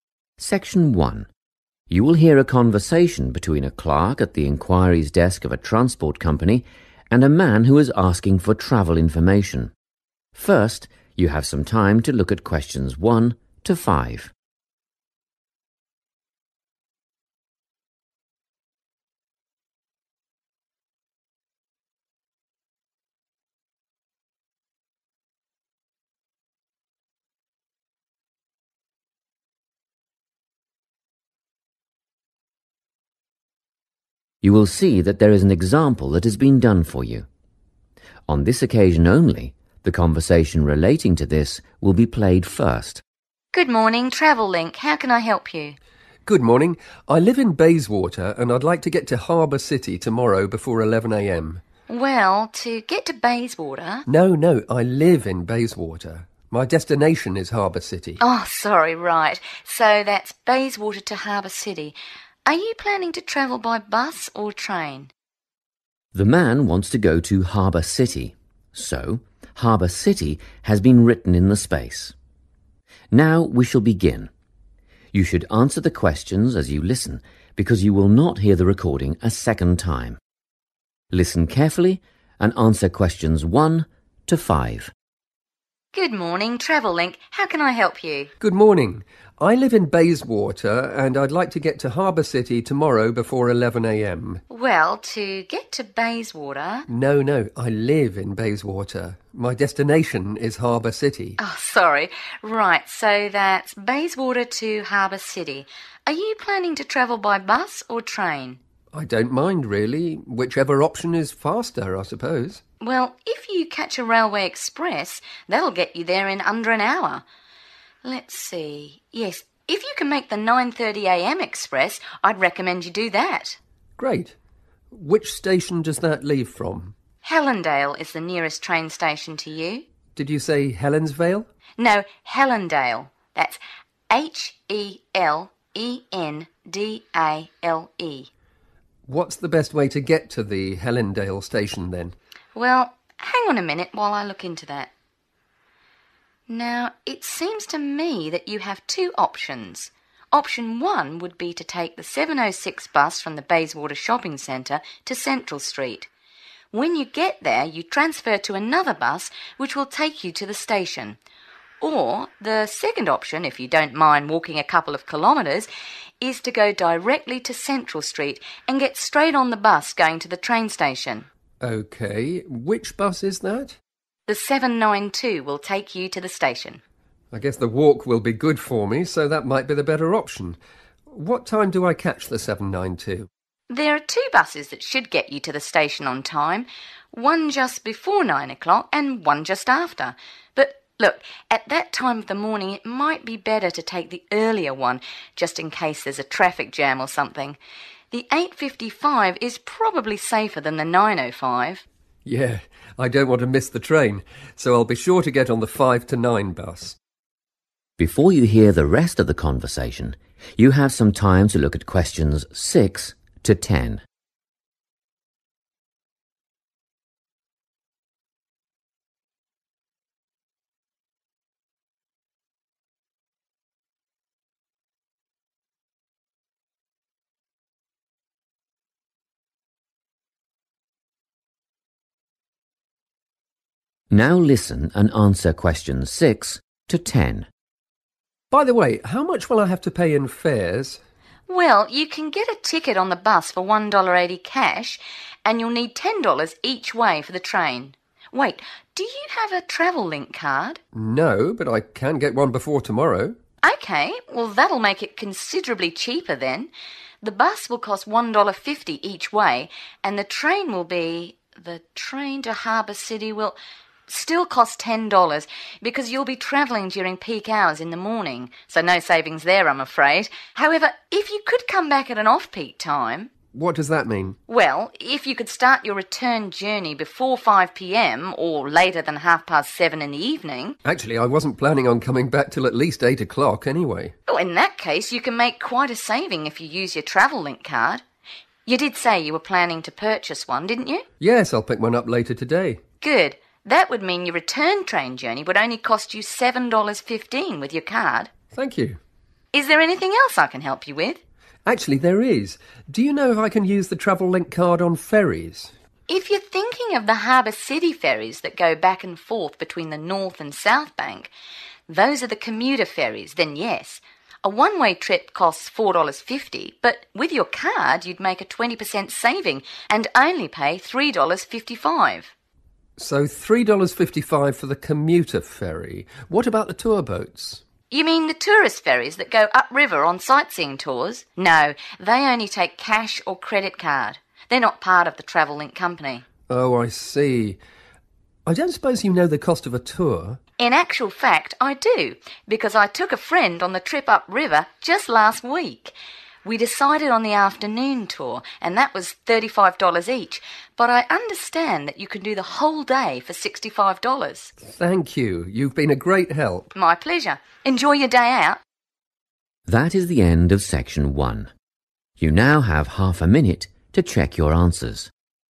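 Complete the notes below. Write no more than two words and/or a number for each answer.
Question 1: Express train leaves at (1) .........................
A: 9.30 a.m.

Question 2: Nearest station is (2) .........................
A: Hellendale

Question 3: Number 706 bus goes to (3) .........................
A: Central Street

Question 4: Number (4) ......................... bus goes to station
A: 792

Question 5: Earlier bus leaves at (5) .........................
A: 8.55

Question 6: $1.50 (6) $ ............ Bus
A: 1.80

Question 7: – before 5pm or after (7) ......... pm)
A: 7.30

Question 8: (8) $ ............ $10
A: 7.15

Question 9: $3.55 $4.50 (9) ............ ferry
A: commuter

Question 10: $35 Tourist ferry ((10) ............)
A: afternoon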